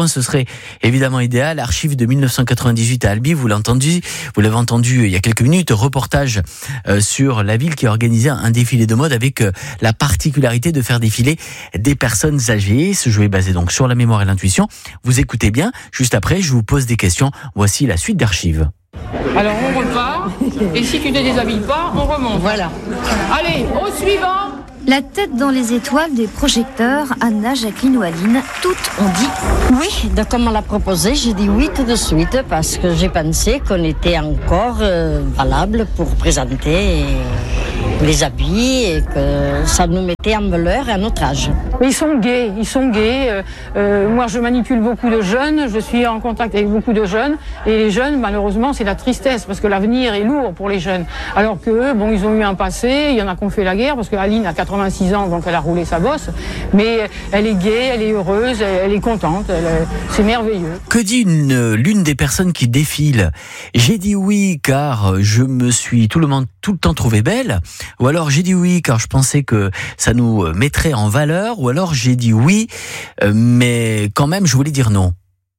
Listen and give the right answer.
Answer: La deuxième.